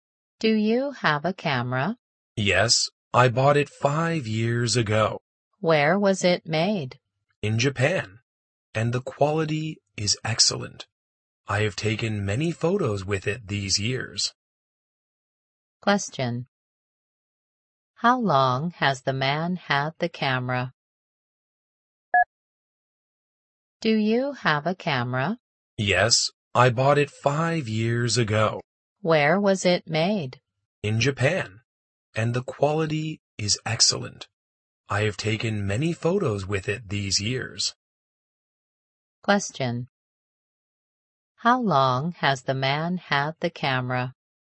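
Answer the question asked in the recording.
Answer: For 5 years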